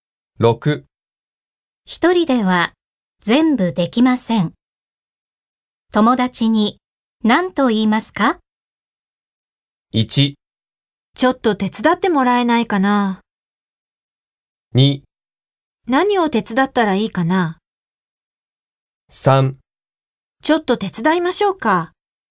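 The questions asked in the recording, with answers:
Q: 一人では全部できません。友達に何と言いますか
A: 1: ちょっと手伝ってもらえないかな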